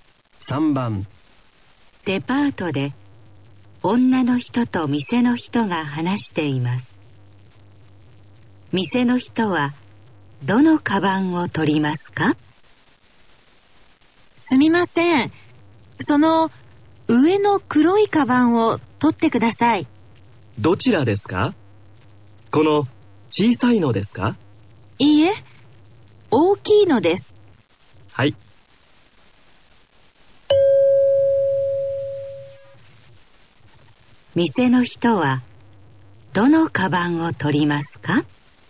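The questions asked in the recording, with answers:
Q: 店の人はどのカバンを取りますか?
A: 上の大きい黒いカバン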